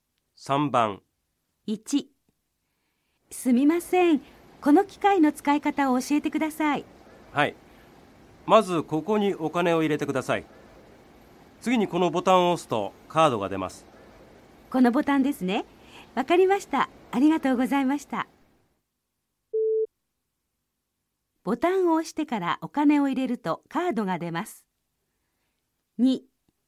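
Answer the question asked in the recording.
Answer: ×(まちがい):お金を入れてからボタンを押します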